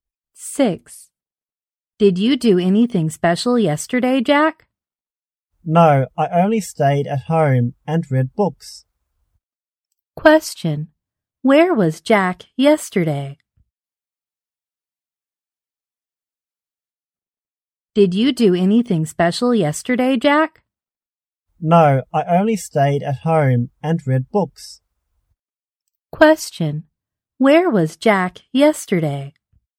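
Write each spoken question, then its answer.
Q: Where was Jack yesterday?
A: At home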